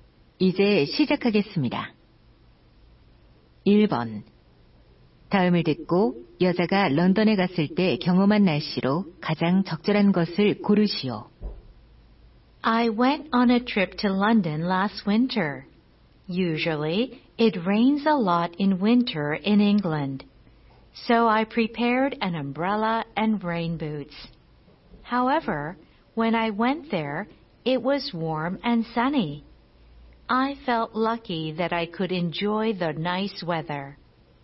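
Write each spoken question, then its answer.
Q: 다음을 듣고 여자가 런던에 갔을 때 경험한 날씨로 가장 적절한 것을 고르시오.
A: 따뜻하고 맑은 날씨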